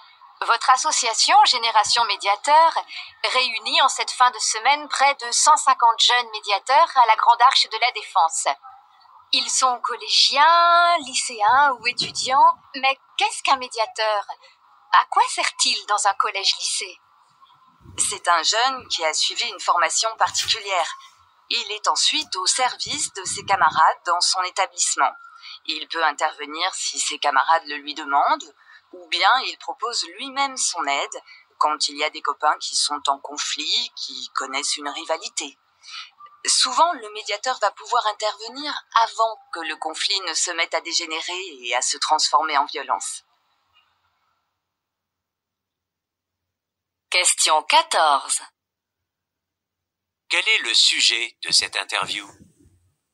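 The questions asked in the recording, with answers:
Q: Quel est le sujet de cette interview ?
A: Le rôle des jeunes médiateurs qui aident à résoudre les conflits entre camarades dans les collèges et lycées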